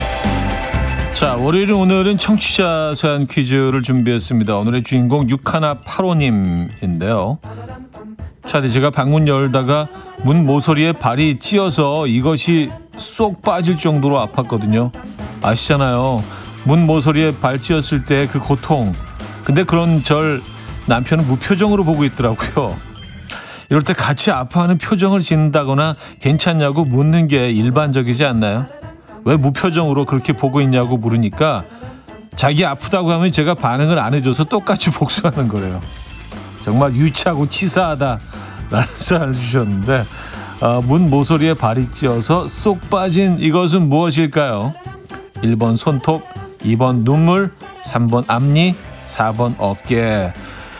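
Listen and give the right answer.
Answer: 2번: 눈물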